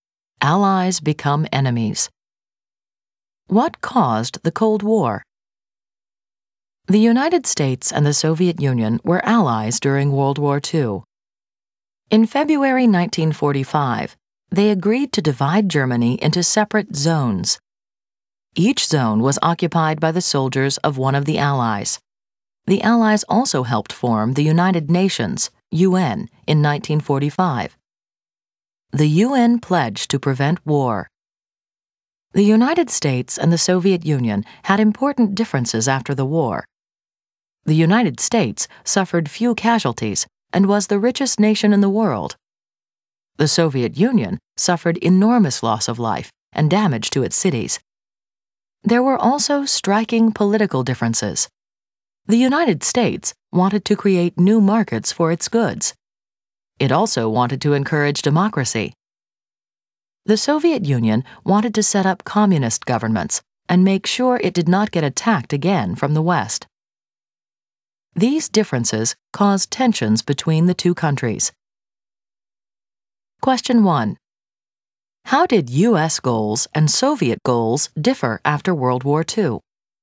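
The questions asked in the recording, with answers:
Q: How did U.S. goals and Soviet goals differ after World War II?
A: The U.S. wanted new markets for its goods and to encourage democracy; the Soviet Union wanted communist governments and protection from attack from the West.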